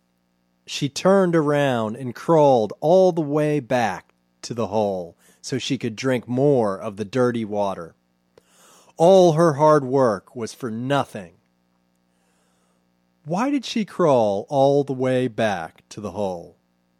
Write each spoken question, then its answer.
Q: Why did she crawl all the way back to the hole?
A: She crawled all the way back to the hole to drink.